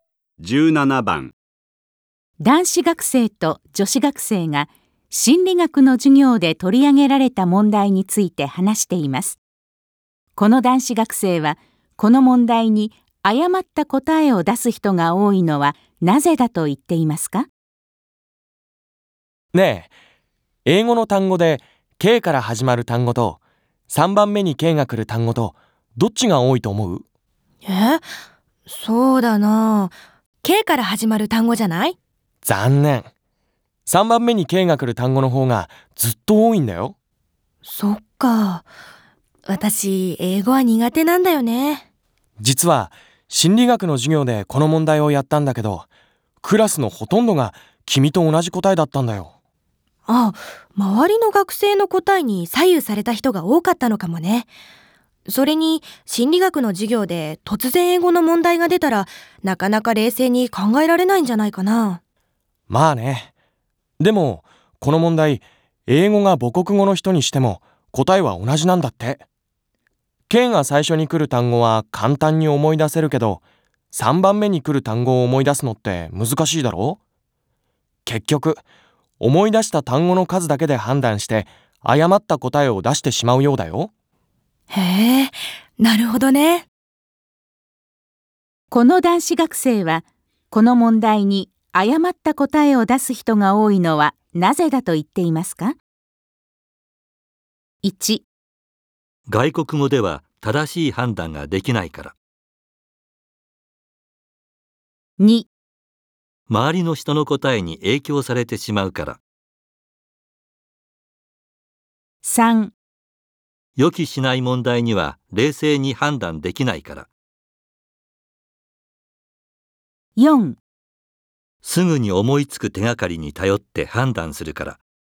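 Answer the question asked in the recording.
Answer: 4: すぐに思いつく手がかりに頼って判断するから。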